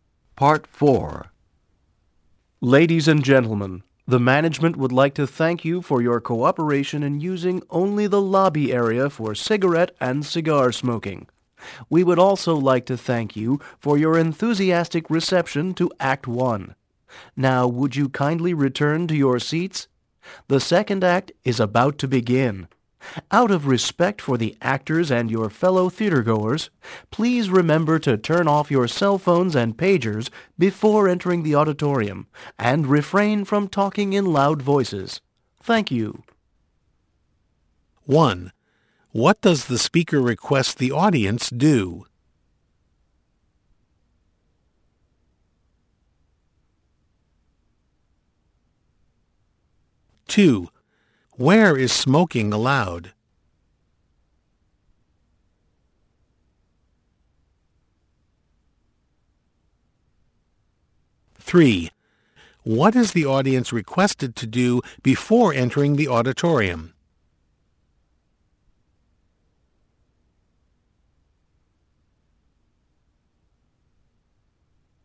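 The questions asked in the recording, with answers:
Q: What does the speaker request the audience do?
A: Return to their seats

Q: Where is smoking allowed?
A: Only in the lobby area

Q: What is the audience requested to do before entering the auditorium?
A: Turn off cell phones and pagers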